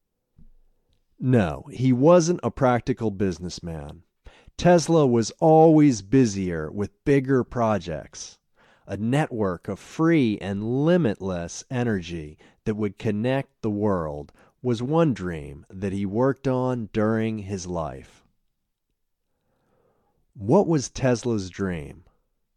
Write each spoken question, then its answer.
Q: What was Tesla's dream?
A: Tesla's dream was a network of free and limitless energy that would connect the world.